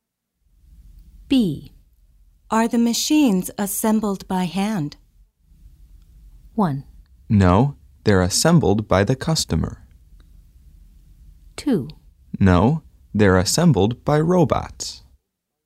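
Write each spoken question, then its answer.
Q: Are the machines assembled by hand?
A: 2: No, they're assembled by robots.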